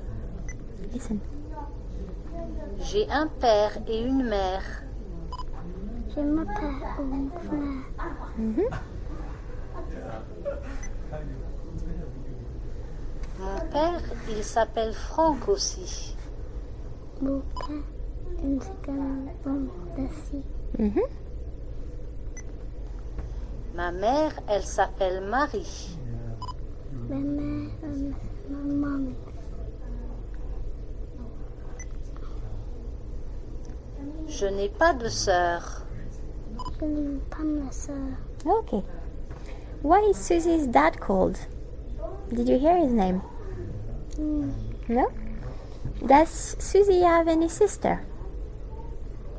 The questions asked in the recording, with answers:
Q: Does Susie have any sister?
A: No.